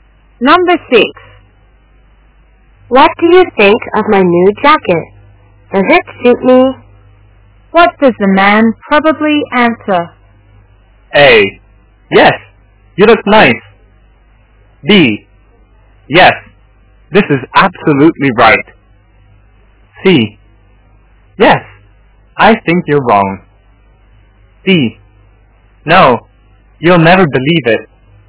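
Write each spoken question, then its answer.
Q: What does the man probably answer?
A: A: Yes, you look nice.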